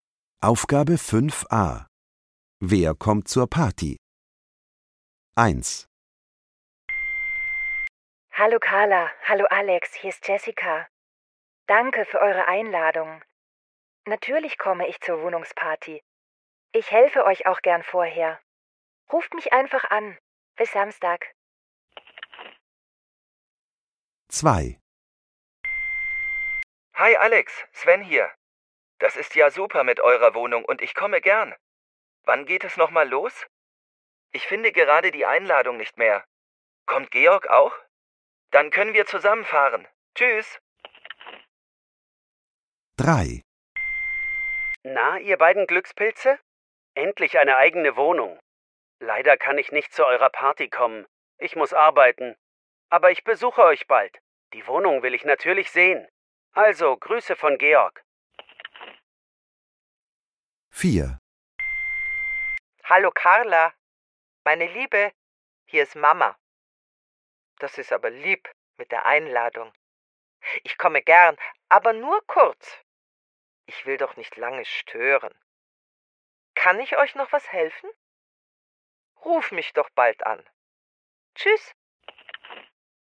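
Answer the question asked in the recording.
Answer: Jessica, Sven und Carlas Mama (Georg kommt nicht)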